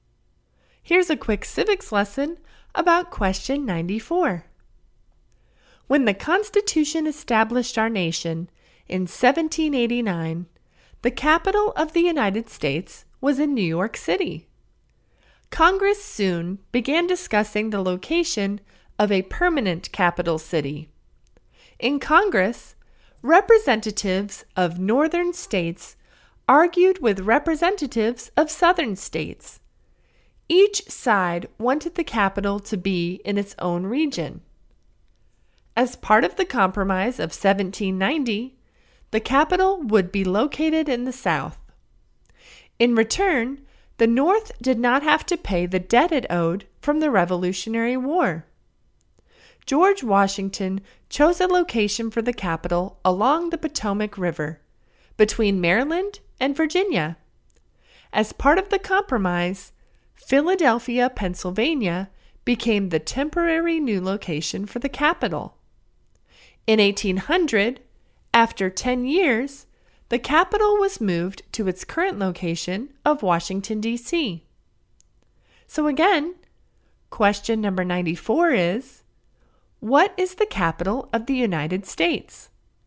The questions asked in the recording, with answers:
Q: what is the capital of the United States?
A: And the answer is Washington, D.C.